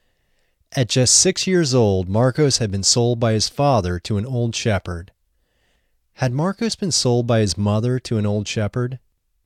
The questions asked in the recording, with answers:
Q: Had Marcos been sold by his mother to an old shepherd?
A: No, Marcos hadn't been sold by his mother.